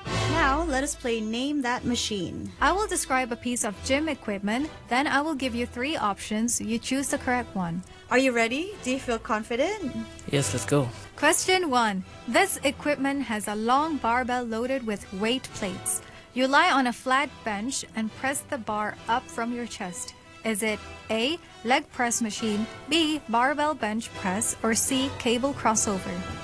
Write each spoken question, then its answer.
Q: Is it A, leg press machine, B, barbell bench press, or C, cable crossover?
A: Have to be bench press.